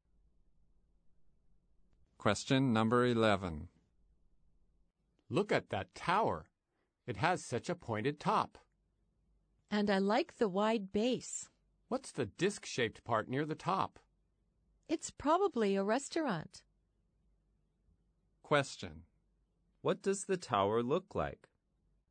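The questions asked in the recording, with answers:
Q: What does the tower look like?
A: It has a pointed top, a wide base, and a disc-shaped part near the top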